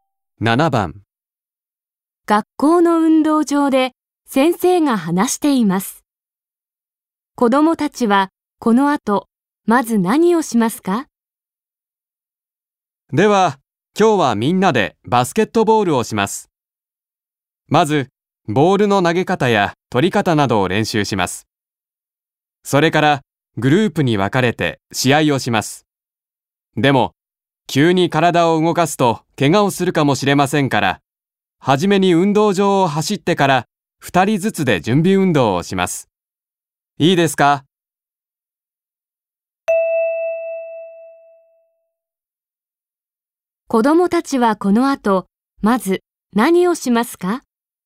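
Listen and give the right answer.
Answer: 運動場を走る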